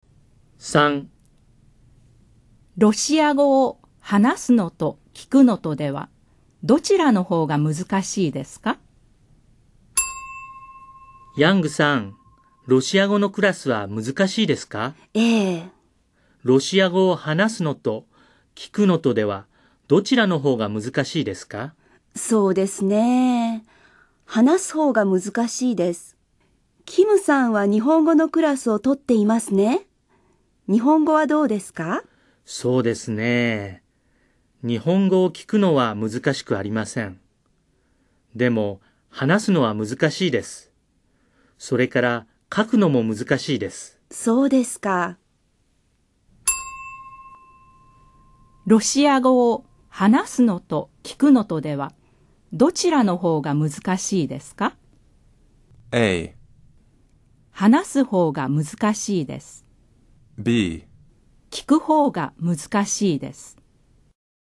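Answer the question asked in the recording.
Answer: A: 話す方が難しいです。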